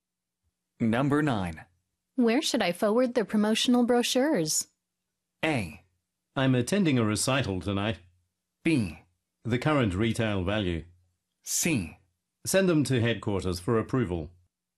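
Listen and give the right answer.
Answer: C: Send them to headquarters for approval.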